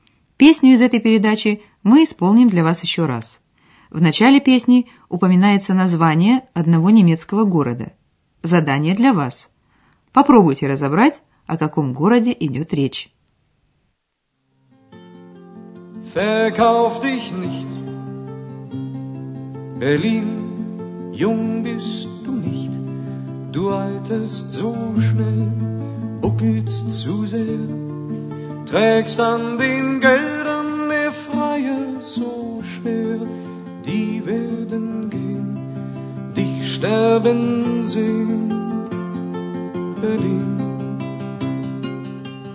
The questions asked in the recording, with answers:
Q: Попробуйте разобрать, о каком городе идет речь.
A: Берлин. Берлин.